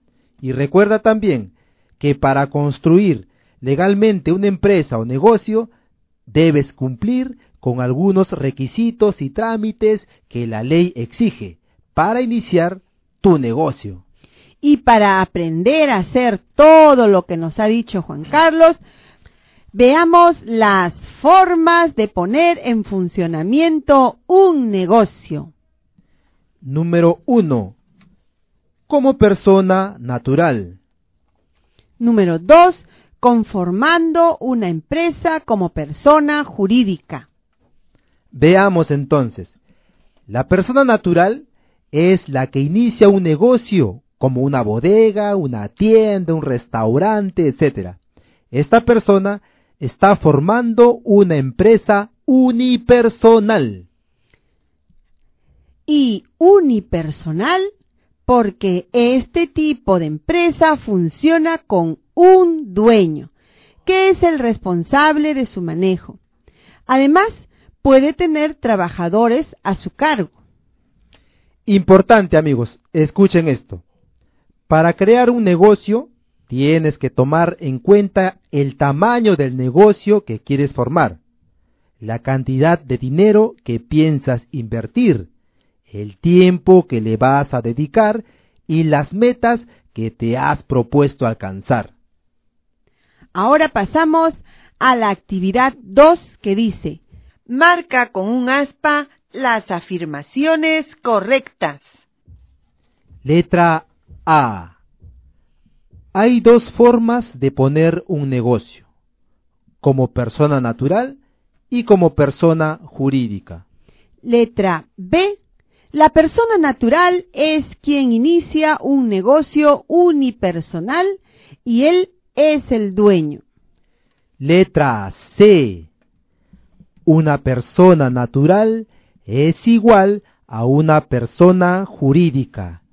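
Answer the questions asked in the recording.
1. Verdadero
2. Verdadero
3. Falso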